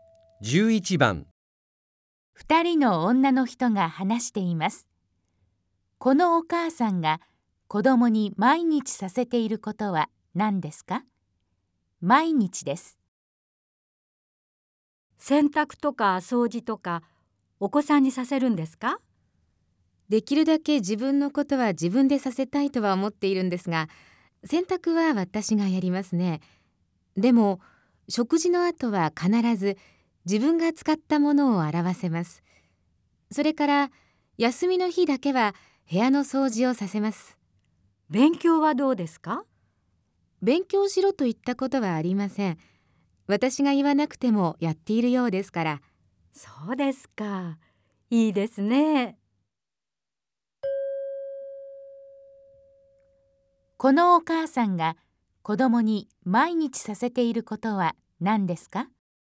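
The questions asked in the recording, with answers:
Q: このお母さんが子供に毎日させていることは何ですか?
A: 食事の後、自分が使ったものを洗うこと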